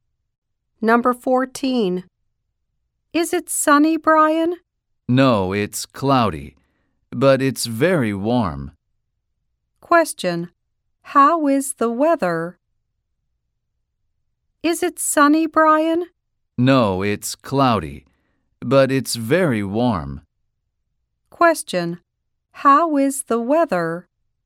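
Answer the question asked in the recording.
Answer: Cloudy but very warm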